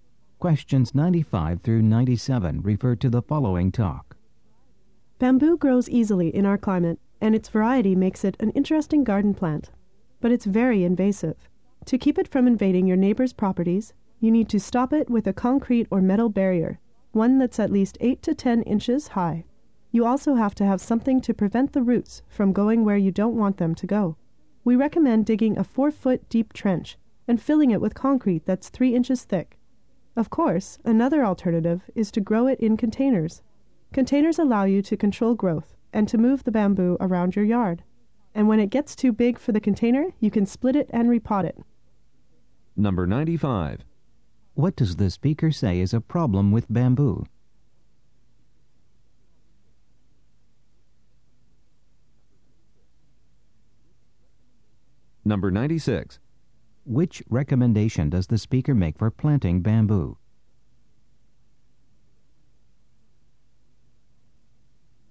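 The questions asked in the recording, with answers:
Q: What does the speaker say is a problem with bamboo?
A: It is very invasive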